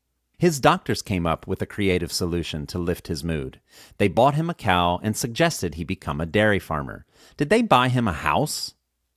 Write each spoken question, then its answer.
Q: Did they buy him a house?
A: No, they didn't buy him a house.